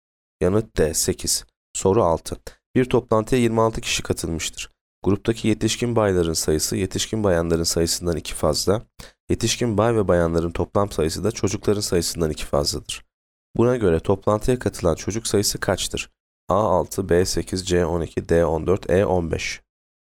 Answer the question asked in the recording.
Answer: Yanıt C 12.